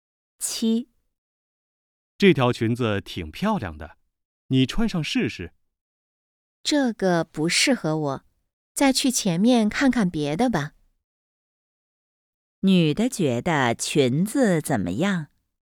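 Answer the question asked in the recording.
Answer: 不适合她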